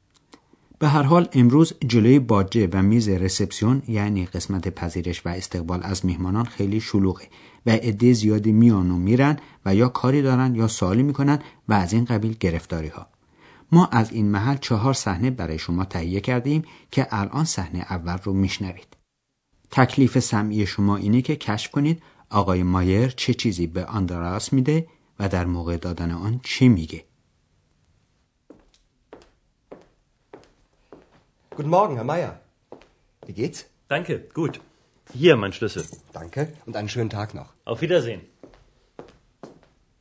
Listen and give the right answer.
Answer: پس آقای مایر کلید اتاقش رو گذاشت روی میز و گفت بفرمایید کلید من.